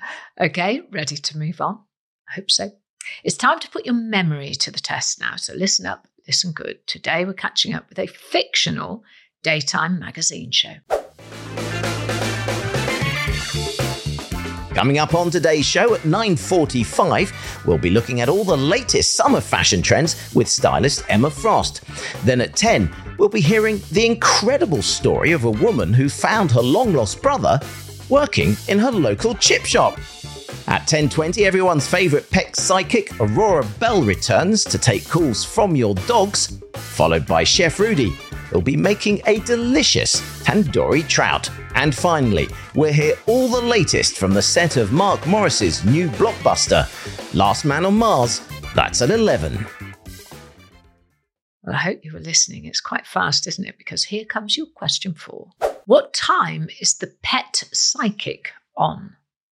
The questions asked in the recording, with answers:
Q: What time is the pet psychic on?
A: The answer is 10:20 a.m.